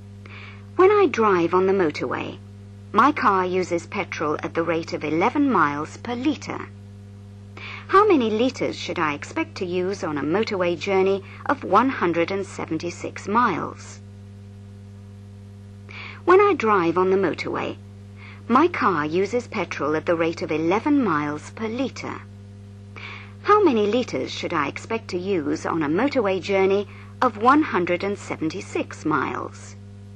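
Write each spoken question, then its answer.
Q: How many litres should I expect to use on a motorway journey of 176 miles?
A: 16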